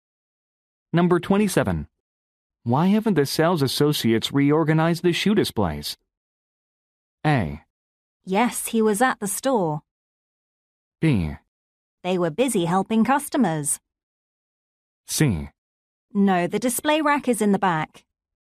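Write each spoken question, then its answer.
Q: Why haven't the sales associates reorganized the shoe displays?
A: B: They were busy helping customers.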